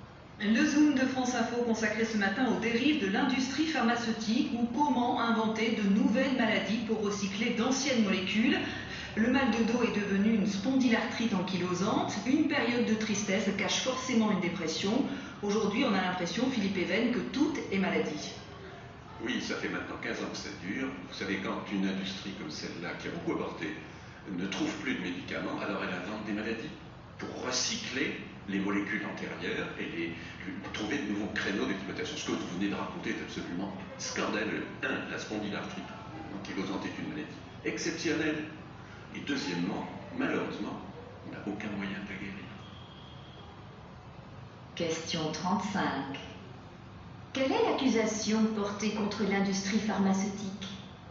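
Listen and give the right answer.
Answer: Elle invente de nouvelles maladies pour recycler d'anciennes molécules.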